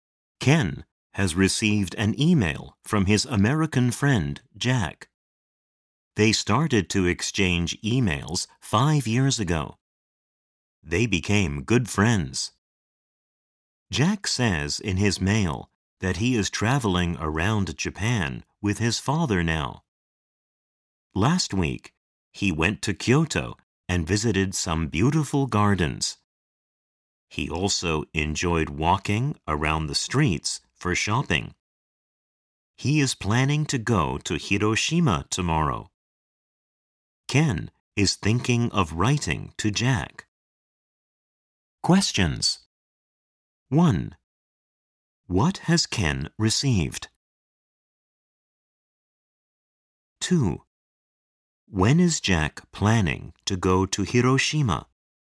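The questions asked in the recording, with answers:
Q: What has Ken received?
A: An email from his American friend, Jack

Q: When is Jack planning to go to Hiroshima?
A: Tomorrow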